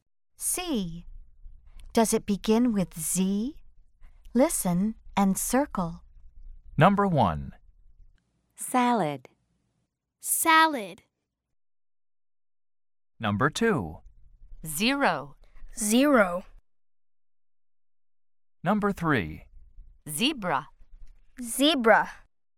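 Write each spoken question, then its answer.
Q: Does it begin with Z?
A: No

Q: Does it begin with Z?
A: Yes

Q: Does it begin with Z?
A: Yes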